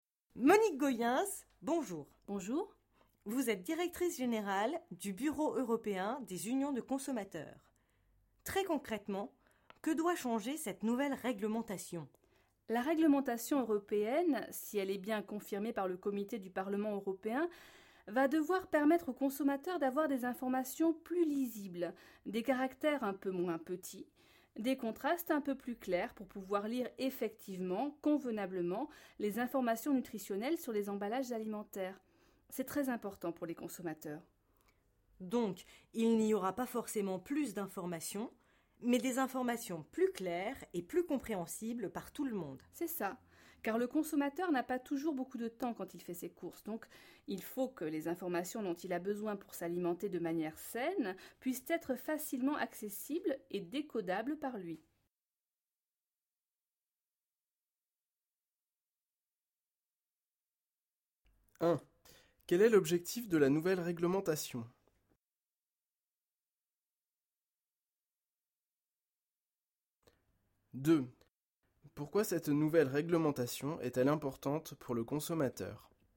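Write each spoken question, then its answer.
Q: Quel est l'objectif de la nouvelle réglementation?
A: Rendre les informations nutritionnelles sur les emballages plus lisibles et plus claires (caractères moins petits, contrastes plus clairs).

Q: pourquoi cette nouvelle réglementation est-elle importante pour le consommateur?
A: Parce que le consommateur a peu de temps pour ses courses et doit pouvoir accéder facilement aux informations pour s'alimenter sainement.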